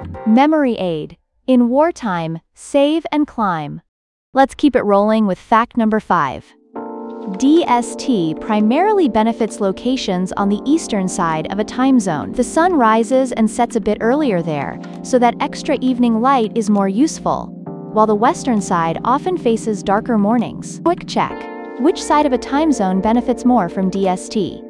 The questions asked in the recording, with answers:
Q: Which side of a time zone benefits more from DST?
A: Correct answer. The eastern side.